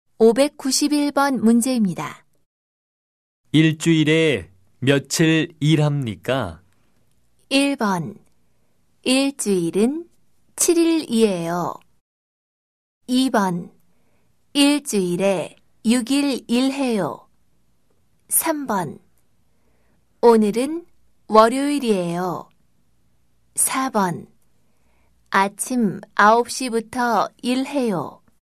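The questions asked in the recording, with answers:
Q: 일주일에 며칠 일합니까?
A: 2: 일주일에 6일 일해요.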